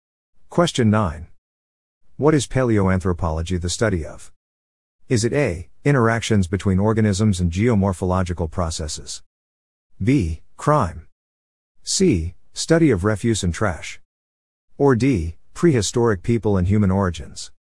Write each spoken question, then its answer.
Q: What is paleoanthropology the study of?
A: The answer is D. Prehistoric people and human origins.